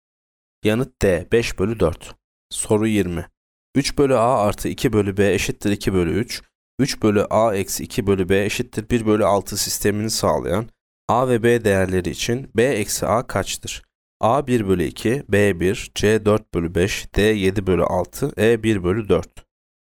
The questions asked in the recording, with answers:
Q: 3 bölü A eksi 2 bölü B eşittir 1 bölü 6 sistemini sağlayan A ve B değerleri için B eksi A kaçtır?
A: Yanıt C. 4 bölü 5.